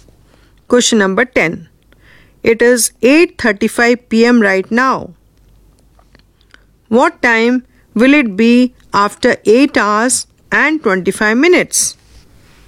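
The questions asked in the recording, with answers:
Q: What time will it be after 8 hours and 25 minutes?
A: 5:00 a.m.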